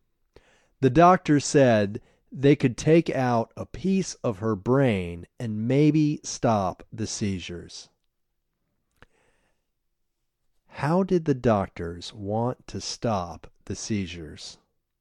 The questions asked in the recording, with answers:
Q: How did the doctors want to stop the seizures?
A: The doctors wanted to stop the seizures by taking out a piece of her brain.